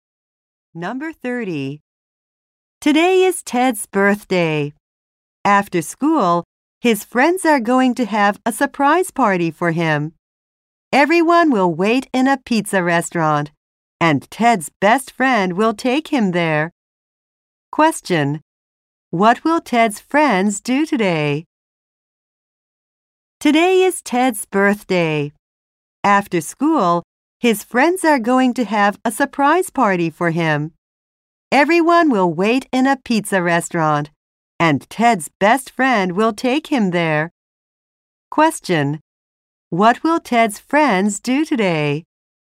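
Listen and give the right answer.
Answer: Have a surprise party for him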